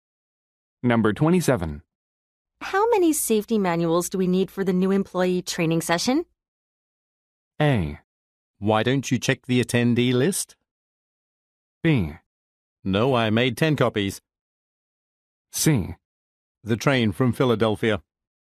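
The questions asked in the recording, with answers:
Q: How many safety manuals do we need for the new employee training session?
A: A: Why don't you check the attendee list?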